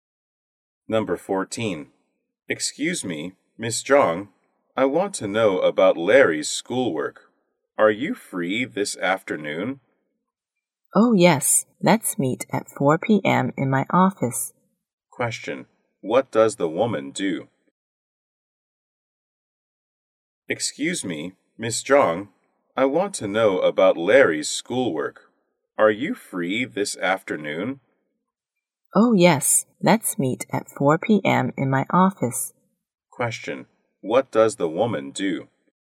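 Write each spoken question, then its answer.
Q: What does the woman do?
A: A teacher.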